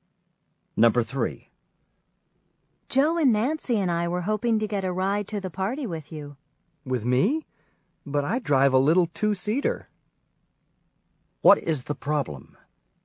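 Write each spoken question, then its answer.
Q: What is the problem?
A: The car only has two seats, not enough room for everyone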